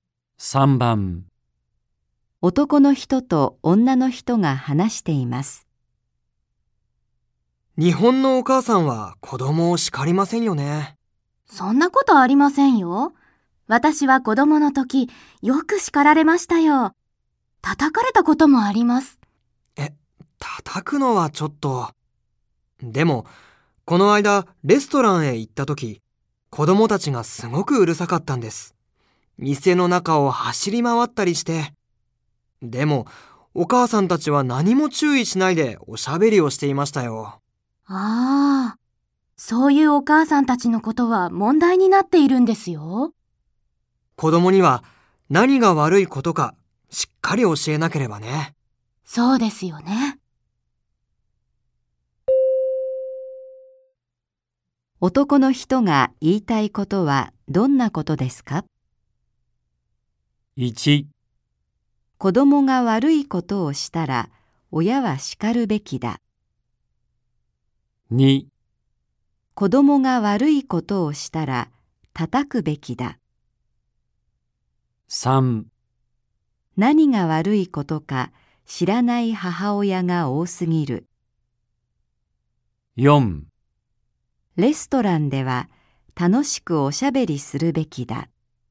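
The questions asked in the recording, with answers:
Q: 男の人が言いたいことはどんなことですか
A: 1: 子供が悪いことをしたら親は叱るべきだ。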